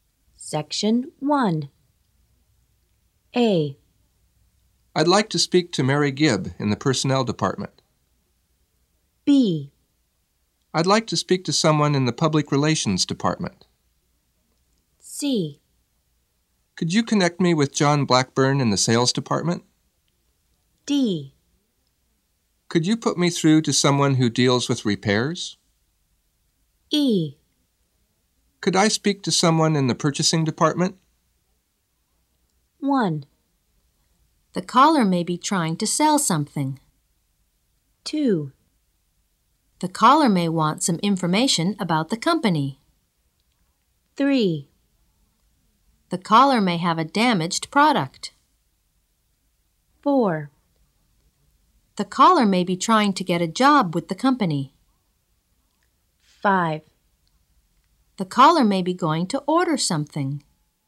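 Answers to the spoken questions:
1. E: Could I speak to someone in the purchasing department?
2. B: I'd like to speak to someone in the public relations department.
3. D: Could you put me through to someone who deals with repairs?
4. A: I'd like to speak to Mary Gibb in the personnel department.
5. C: Could you connect me with John Blackburn in the sales department?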